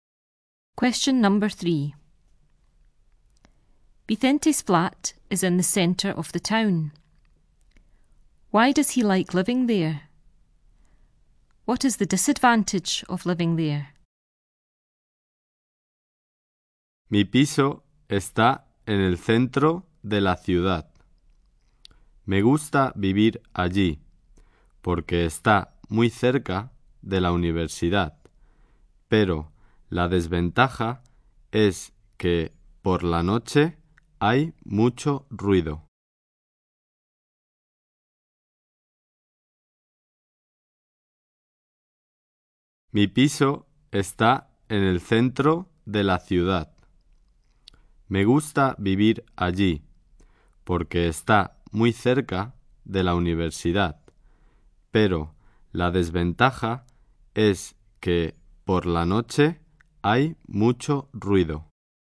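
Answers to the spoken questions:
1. It is very close to the university
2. It is very noisy at night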